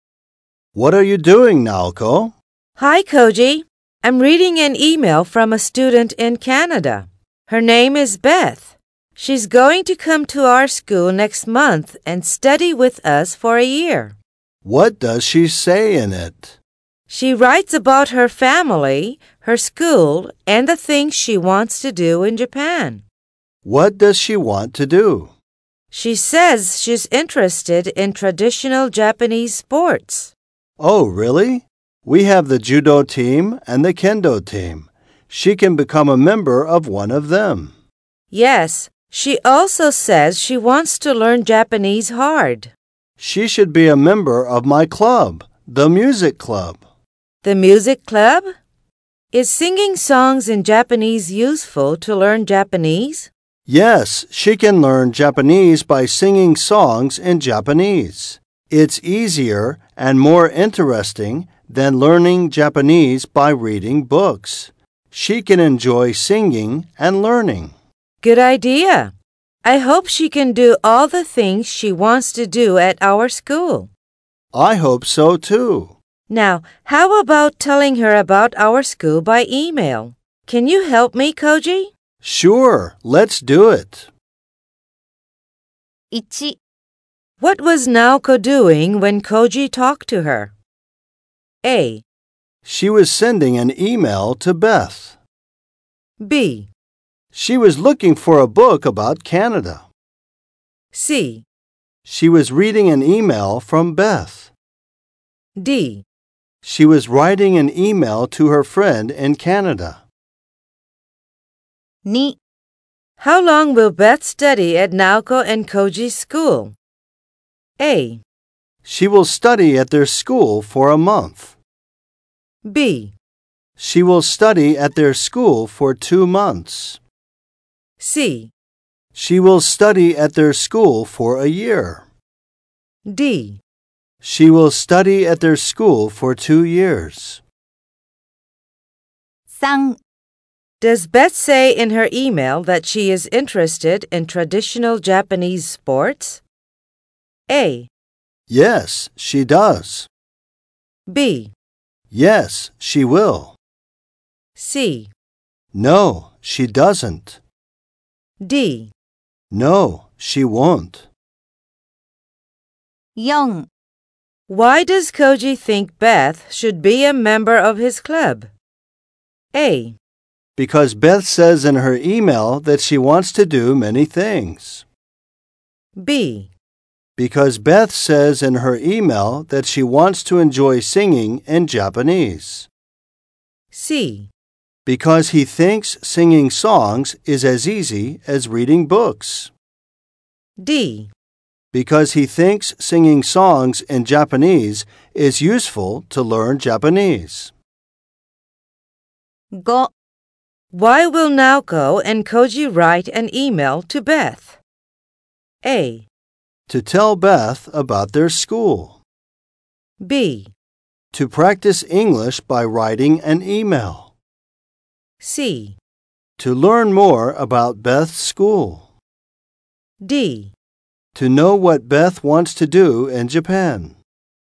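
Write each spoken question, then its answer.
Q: What was Naoko doing when Koji talked to her?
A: C: She was reading an email from Beth.

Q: How long will Beth study at Naoko and Koji's school?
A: C: She will study at their school for a year.

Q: Does Beth say in her email that she is interested in traditional Japanese sports?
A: A: Yes, she does.

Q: Why does Koji think Beth should be a member of his club?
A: D: Because he thinks singing songs in Japanese is useful to learn Japanese.

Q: Why will Naoko and Koji write an email to Beth?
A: A: To tell Beth about their school.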